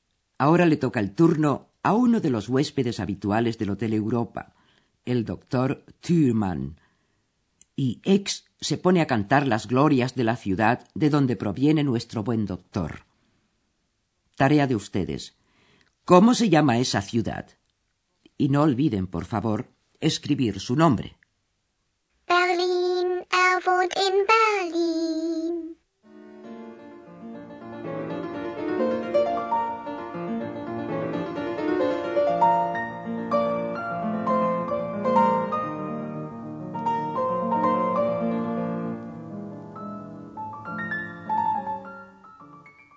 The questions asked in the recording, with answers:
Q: Tarea de ustedes. ¿Cómo se llama esa ciudad?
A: ese nombre era, evidentemente, Berlín.